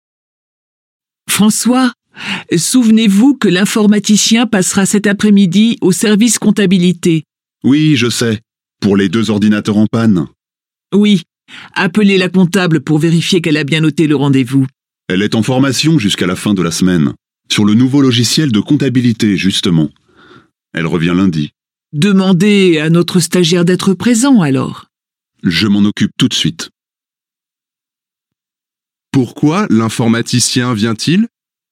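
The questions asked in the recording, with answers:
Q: Pourquoi l'informaticien vient-il?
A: Pour réparer les deux ordinateurs en panne.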